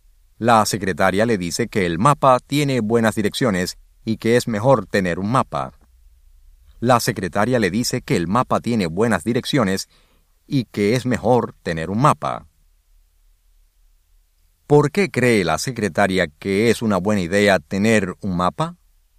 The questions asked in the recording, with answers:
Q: ¿Por qué cree la secretaria que es una buena idea tener un mapa?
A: La secretaria le dice que el mapa tiene buenas direcciones.